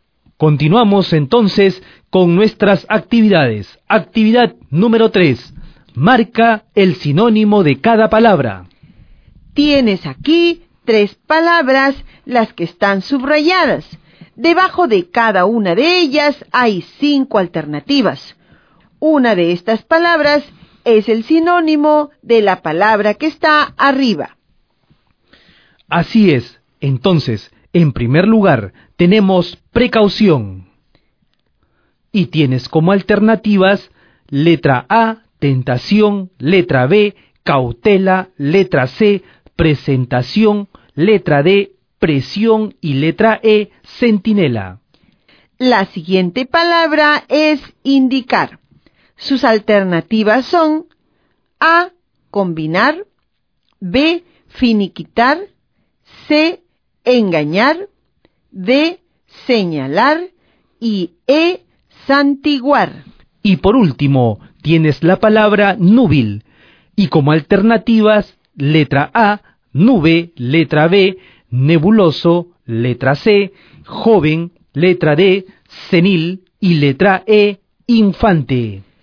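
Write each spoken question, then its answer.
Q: Así es. Entonces, en primer lugar, tenemos precaución.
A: B: cautela

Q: La siguiente palabra es indicar.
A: D: señalar

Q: Y por último, tienes la palabra núbil.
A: Su sinónimo está en la alternativa C, joven.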